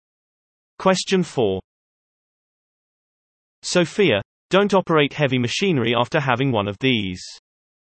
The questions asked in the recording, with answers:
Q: Sophia, don't operate heavy machinery after having one of these.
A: Answer, screwdriver.